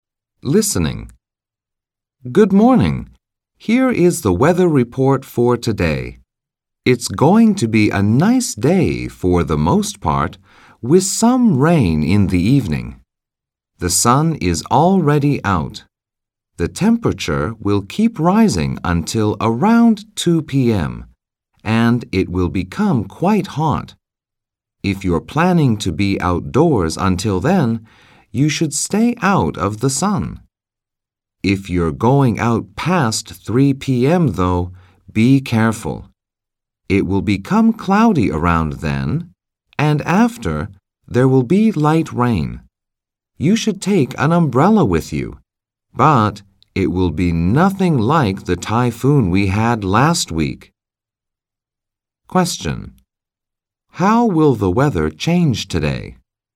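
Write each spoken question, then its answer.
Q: How will the weather change today?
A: It will be sunny and hot, then cloudy after about 3 p.m., with light rain later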